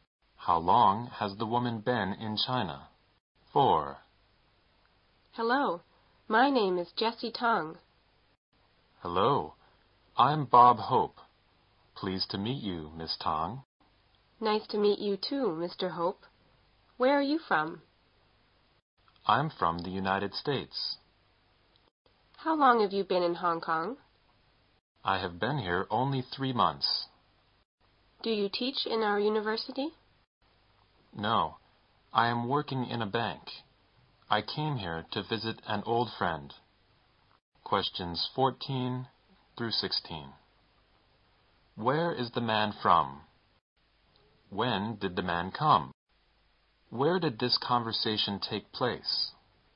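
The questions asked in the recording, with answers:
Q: Where is the man from?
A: The United States

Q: When did the man come?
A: Three months ago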